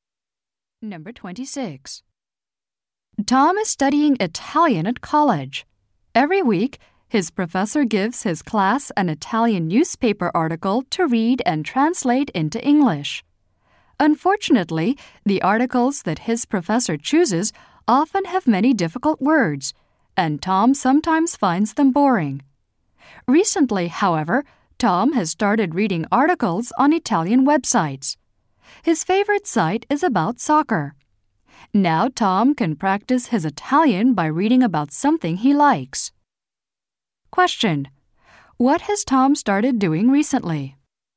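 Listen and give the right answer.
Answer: Reading articles on Italian websites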